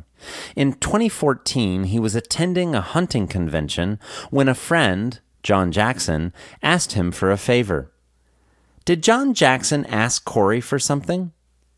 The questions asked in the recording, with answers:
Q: Did John Jackson ask Corey for something?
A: Yes, John Jackson asked Corey for a favor.